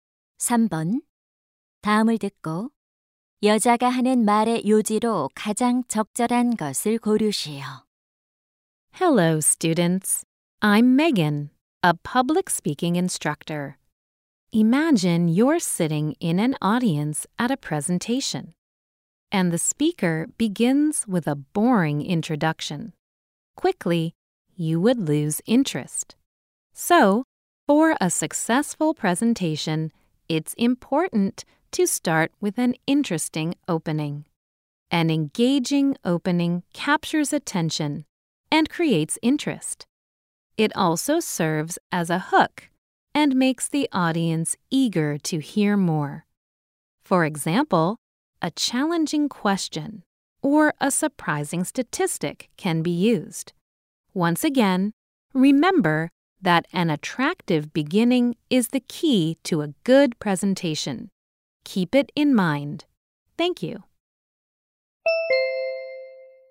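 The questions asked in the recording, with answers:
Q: 다음을 듣고 여자가 하는 말의 요지로 가장 적절한 것을 고르시오.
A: 성공적인 발표를 위해서는 흥미로운 도입부가 중요하다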